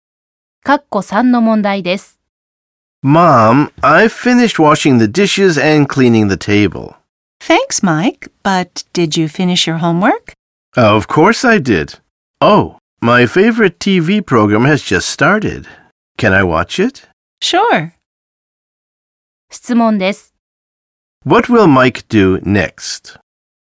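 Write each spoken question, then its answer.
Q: What will Mike do next?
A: Watch his favorite TV program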